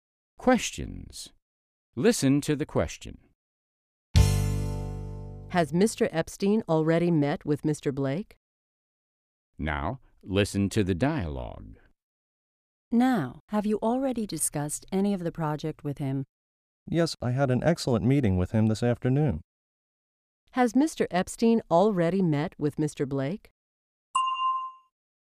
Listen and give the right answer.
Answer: Yes, they met earlier that afternoon.